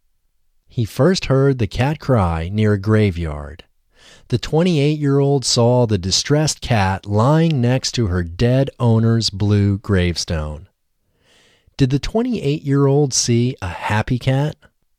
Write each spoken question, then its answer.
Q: Did the 28-year-old see a happy cat?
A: No, the 28-year-old didn't see a happy cat.